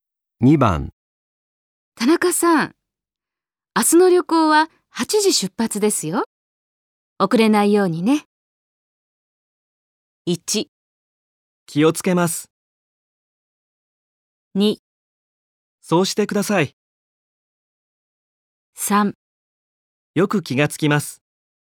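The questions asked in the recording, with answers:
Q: 田中さん、明日の旅行は8時出発ですよ。遅れないようにね。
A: 1: 気をつけます。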